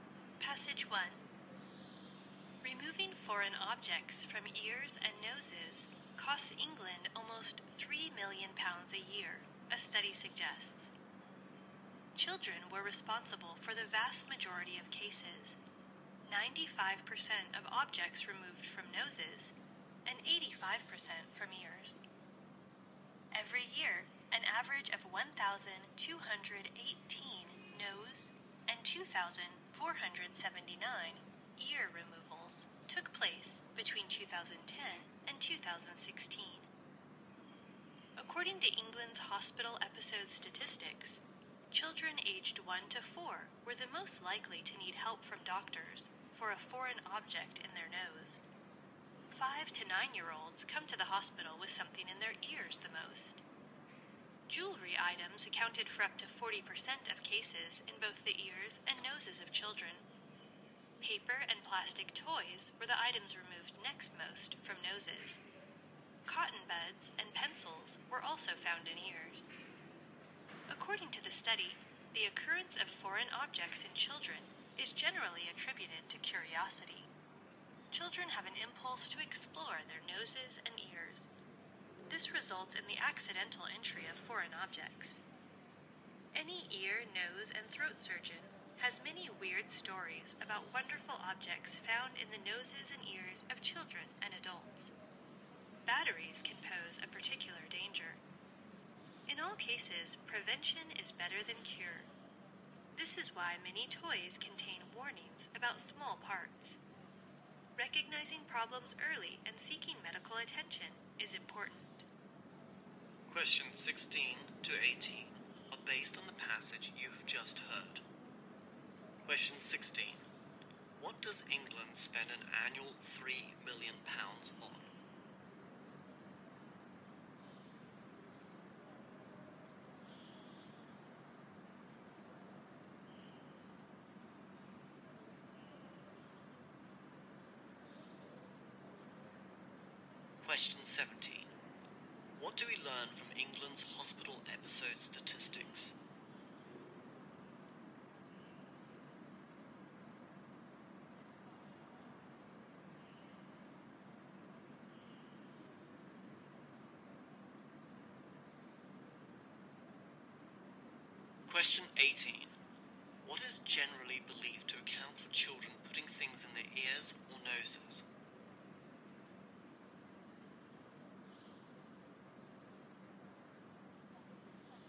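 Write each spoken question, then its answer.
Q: What does England spend an annual £3 million on?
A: Removing foreign objects from people's ears and noses.

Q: What is generally believed to account for children putting things in their ears or noses?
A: Curiosity.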